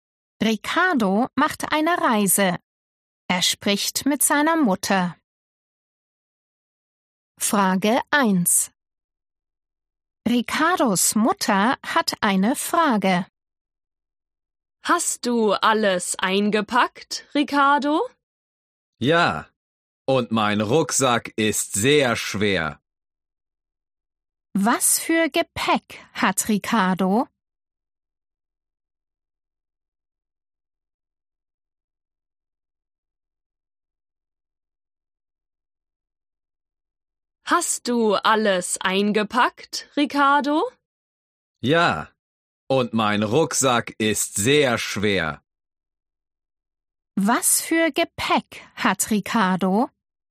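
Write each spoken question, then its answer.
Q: Was für Gepäck hat Ricardo?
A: einen Rucksack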